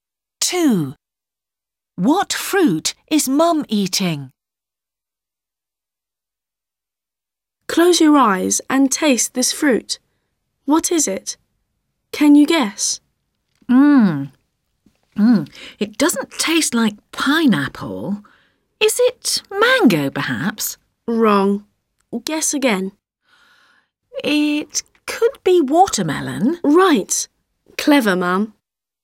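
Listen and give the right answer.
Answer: watermelon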